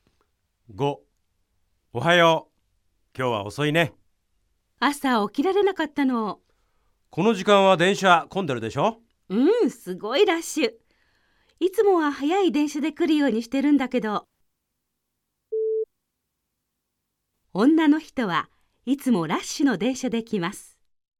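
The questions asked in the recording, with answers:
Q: 女の人はいつもラッシュの電車で来ます。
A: ×(正しくない)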